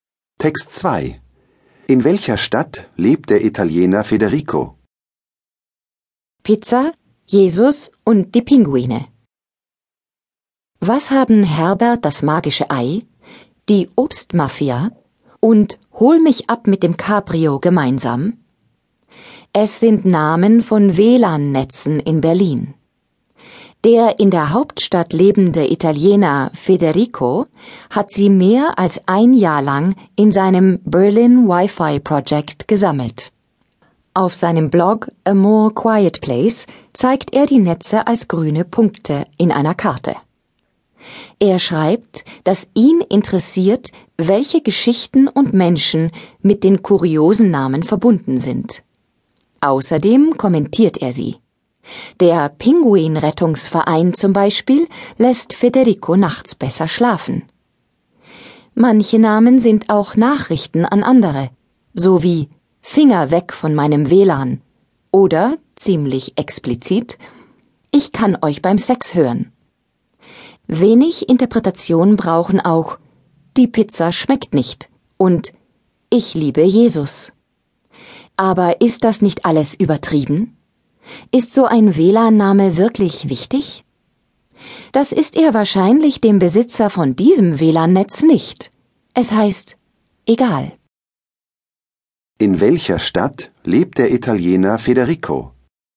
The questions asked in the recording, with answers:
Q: In welcher Stadt lebt der Italiener Federico?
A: Er lebt in Berlin.